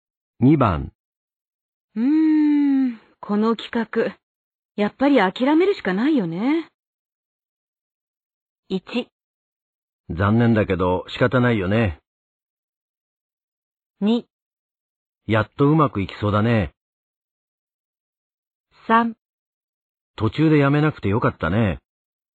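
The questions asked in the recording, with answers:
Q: この企画、やっぱり諦めるしかないよね。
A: 1: 残念だけど仕方ないよね。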